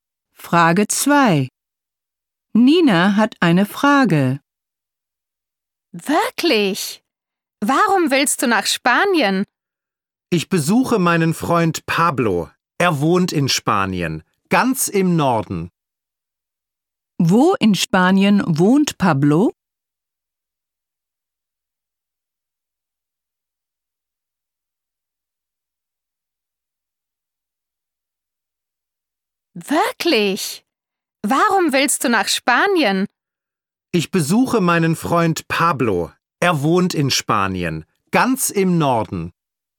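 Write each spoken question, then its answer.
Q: Wo in Spanien wohnt Pablo?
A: Ganz im Norden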